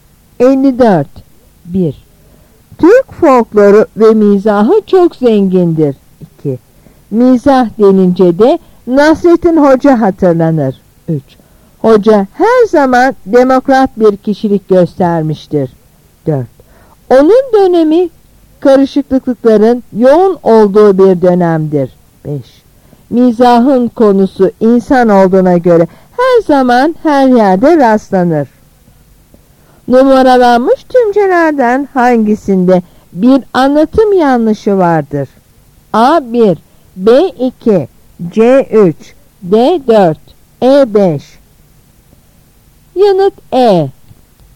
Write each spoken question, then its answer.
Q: Numaralanmış tümcelerden hangisinde bir anlatım yanlışı vardır?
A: Yanıt E.